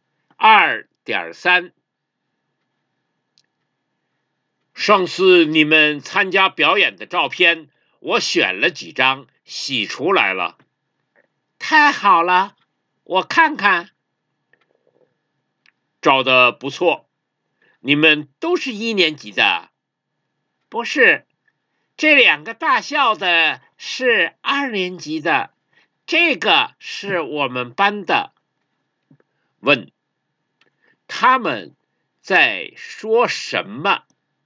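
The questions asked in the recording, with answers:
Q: 问,他们在说什么?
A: 表演的照片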